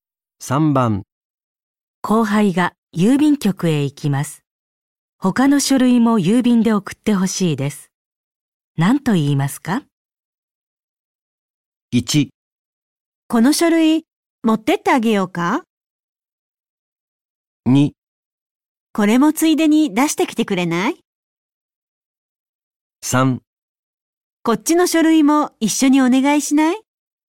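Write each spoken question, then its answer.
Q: 後輩が郵便局へ行きます。他の書類も郵便で送ってほしいです。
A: 2: これもついでに出してきてくれない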